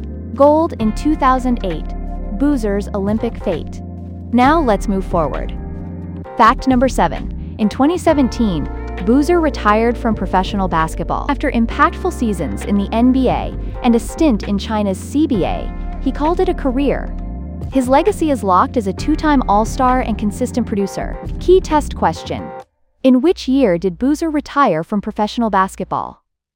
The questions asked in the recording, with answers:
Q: in which year did Boozer retire from professional basketball?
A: 2017.